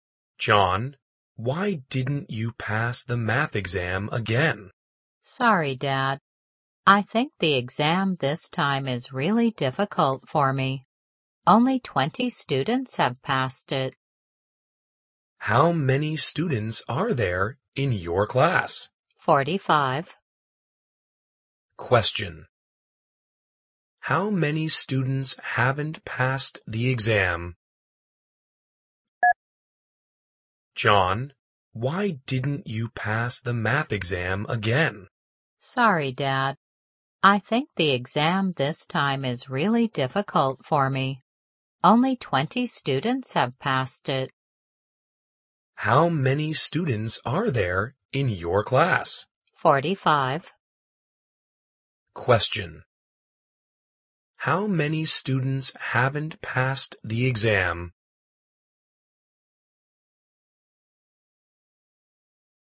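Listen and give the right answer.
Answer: 25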